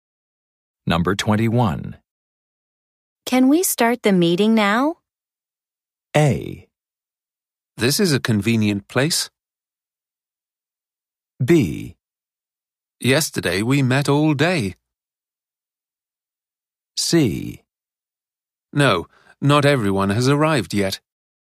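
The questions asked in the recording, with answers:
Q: Can we start the meeting now?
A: C: No, not everyone has arrived yet.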